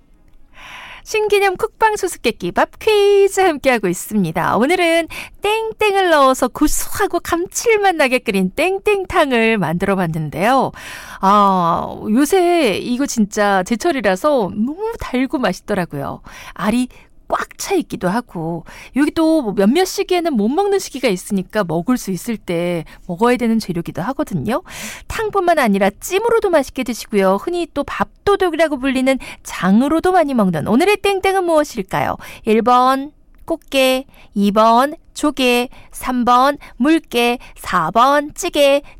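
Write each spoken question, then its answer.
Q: 탕뿐만 아니라 찜으로도 맛있게 드시고요. 흔히 또 밥도둑이라고 불리는 장으로도 많이 먹는 오늘의 땡땡은 무엇일까요?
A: 1: 꽃게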